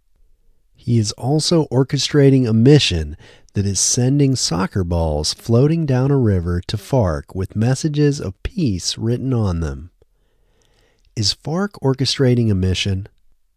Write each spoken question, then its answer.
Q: Is FARC orchestrating a mission?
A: No, FARC isn't orchestrating a mission.